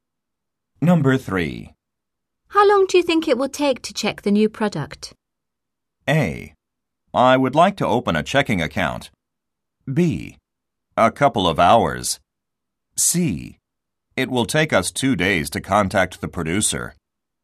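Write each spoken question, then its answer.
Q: How long do you think it will take to check the new product?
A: B: A couple of hours.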